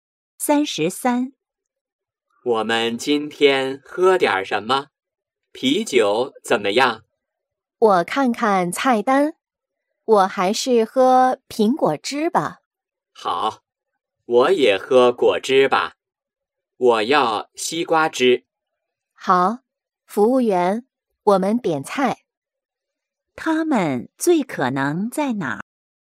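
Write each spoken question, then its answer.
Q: 他们最可能在哪儿?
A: 饭馆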